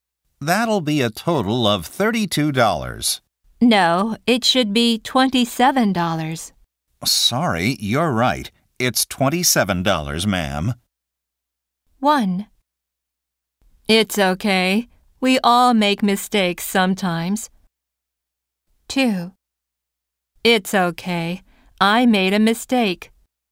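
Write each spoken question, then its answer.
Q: Sorry, you're right. It's $27, ma'am.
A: 1: It's okay. We all make mistakes sometimes.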